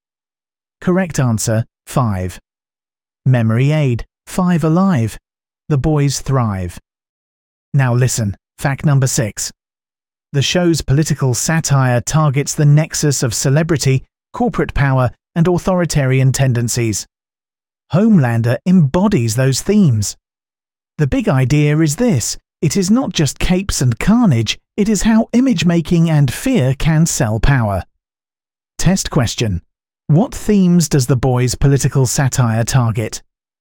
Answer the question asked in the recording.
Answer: Correct answer. Celebrity, corporate power, and authoritarian tendencies.